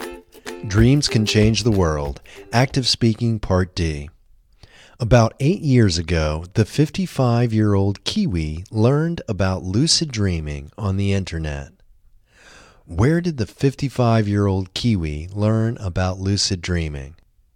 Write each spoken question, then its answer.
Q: Where did the 55-year-old Kiwi learn about lucid dreaming?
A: The 55-year-old Kiwi learned about lucid dreaming on the internet.